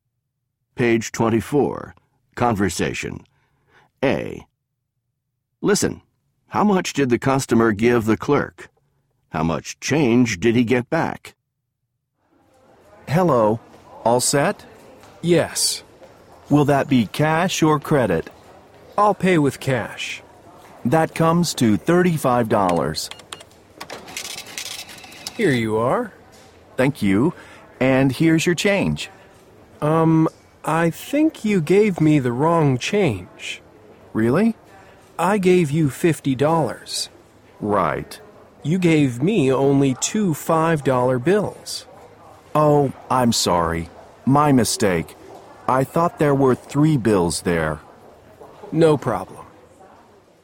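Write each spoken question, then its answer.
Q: how much did the customer give the clerk?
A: $50

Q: How much change did he get back?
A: $10 (two $5 bills), but it should have been $15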